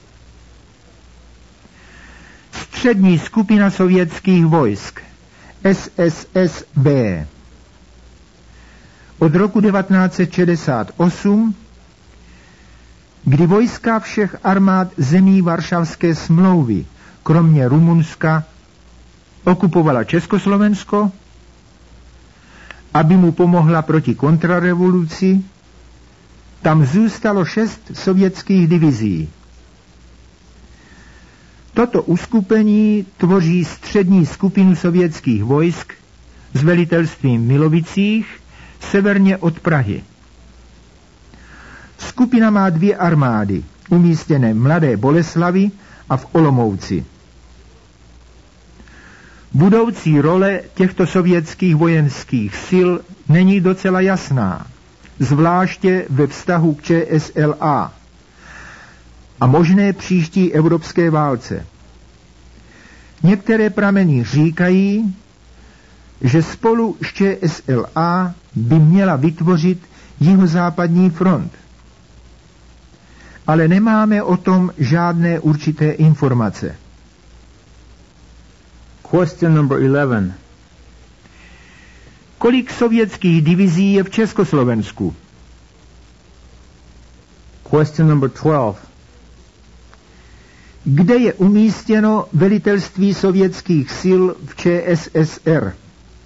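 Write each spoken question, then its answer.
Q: Kde je umístěno velitelství sovětských sil v ČSSR?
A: V Milovicích, severně od Prahy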